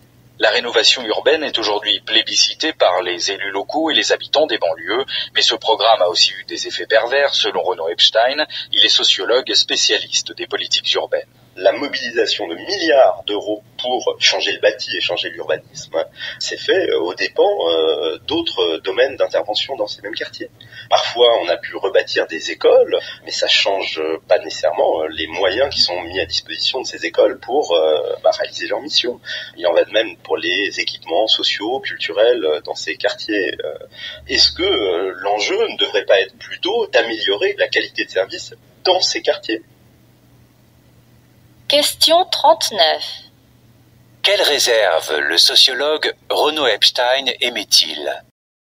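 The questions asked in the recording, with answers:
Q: Quelle réserve le sociologue Renaud Epstein émet-il ?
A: Les milliards investis dans le bâti et l'urbanisme l'ont été aux dépens d'autres domaines, comme les moyens des écoles et la qualité des services dans ces quartiers.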